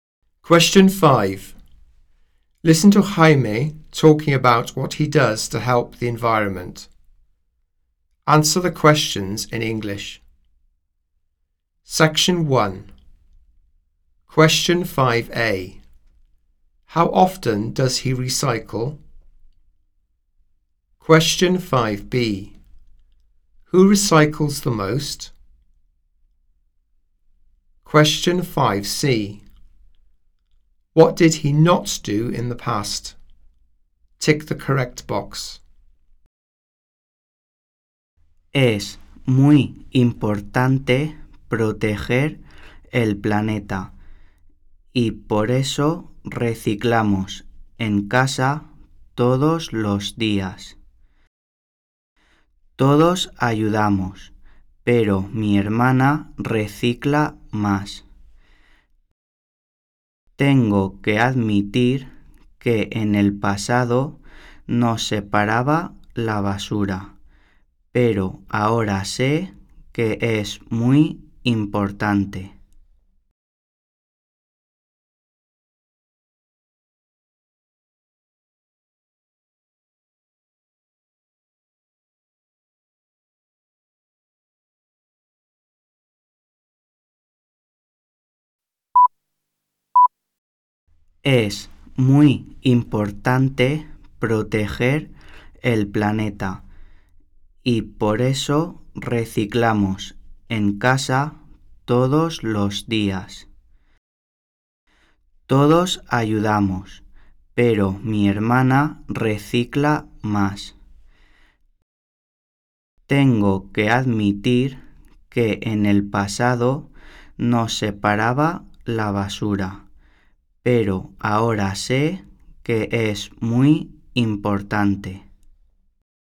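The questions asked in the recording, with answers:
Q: How often does he recycle?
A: Every day

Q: Who recycles the most?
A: His sister

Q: What did he not do in the past?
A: Separate the rubbish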